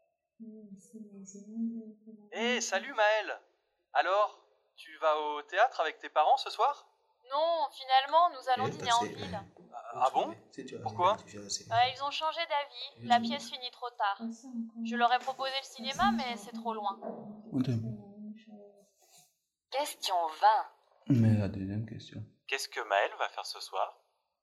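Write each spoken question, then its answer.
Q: Qu'est-ce que Maëlle va faire ce soir?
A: Dîner en ville avec ses parents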